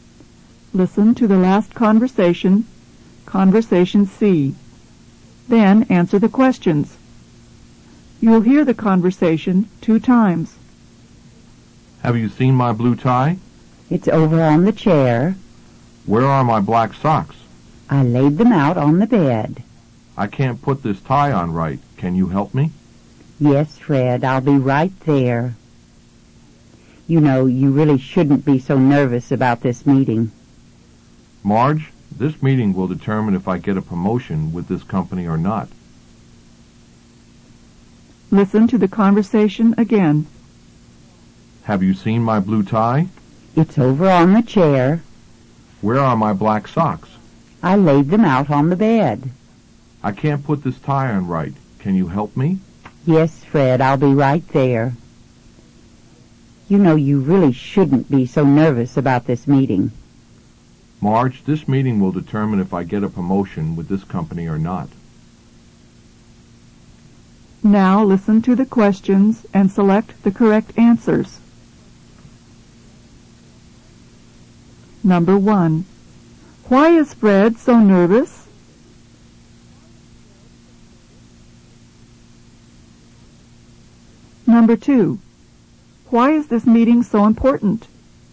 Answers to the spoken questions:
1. Number one is A. He's nervous because he has a meeting.
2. Number two is B. The meeting is important because he might get a promotion.